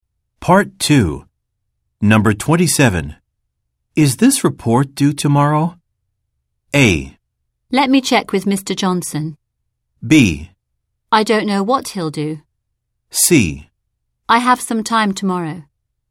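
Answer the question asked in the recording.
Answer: A: Let me check with Mr. Johnson.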